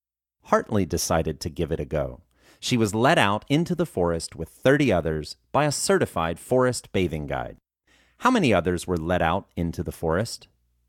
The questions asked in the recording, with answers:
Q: How many others were led out into the forest?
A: 30 others were led out into the forest.